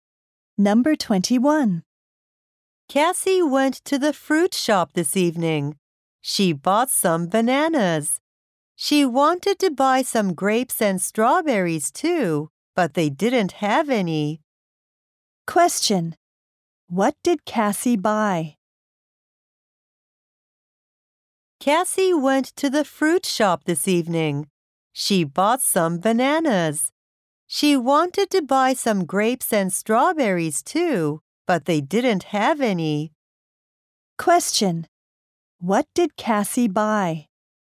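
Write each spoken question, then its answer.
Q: What did Cassie buy?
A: Some bananas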